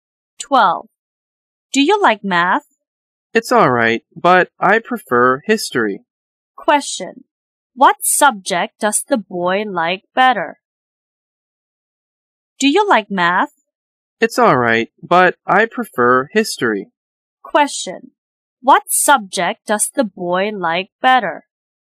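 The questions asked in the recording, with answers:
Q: What subject does the boy like better?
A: History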